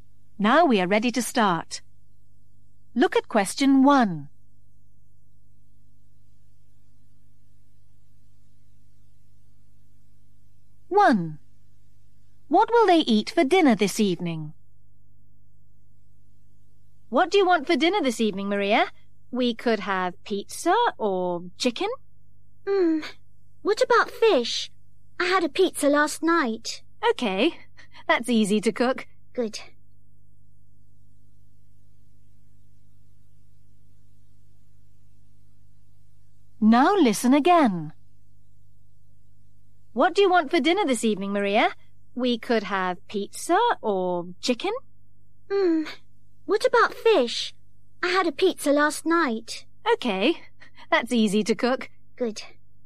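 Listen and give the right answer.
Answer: fish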